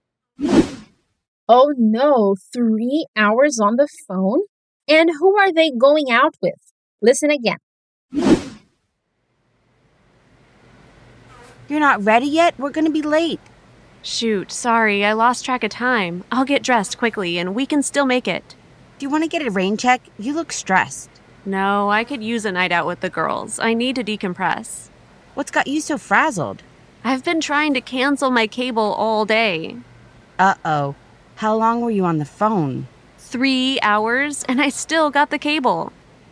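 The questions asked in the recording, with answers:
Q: And who are they going out with?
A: The girls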